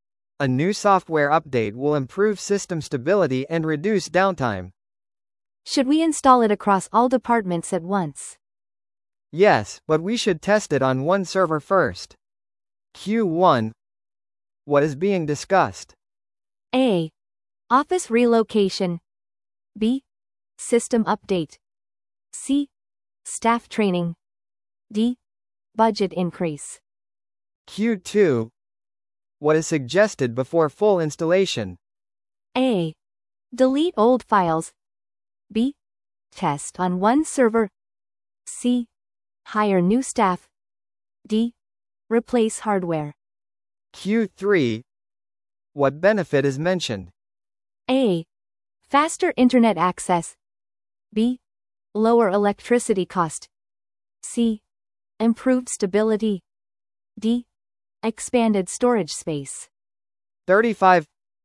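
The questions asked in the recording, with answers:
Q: What is being discussed?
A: B: System update.

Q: What is suggested before full installation?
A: B: Test on one server.

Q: What benefit is mentioned?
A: C: Improved stability.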